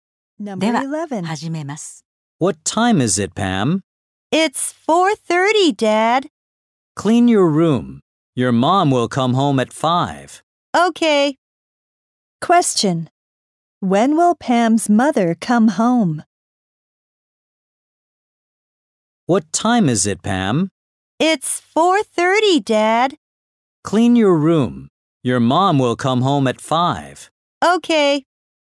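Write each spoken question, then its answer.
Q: Question. When will Pam's mother come home?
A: At 5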